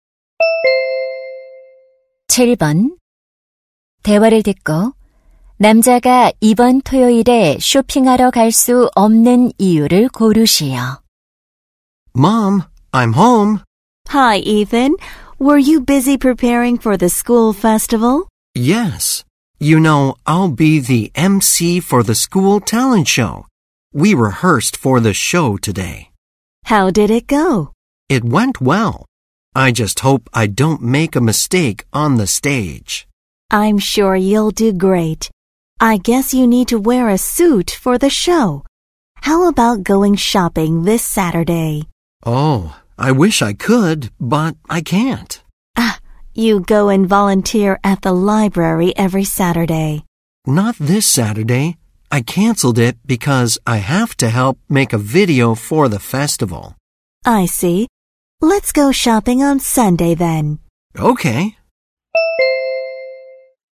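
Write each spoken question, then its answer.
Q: 대화를 듣고 남자가 이번 토요일에 쇼핑하러 갈 수 없는 이유를 고르시오.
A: 축제 영상 제작을 도와야 해서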